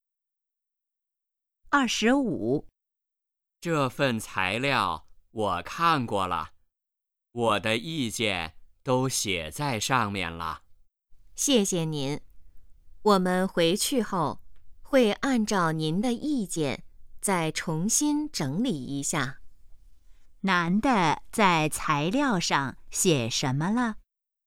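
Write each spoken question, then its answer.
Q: 男的在材料上写什么了?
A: 他的意见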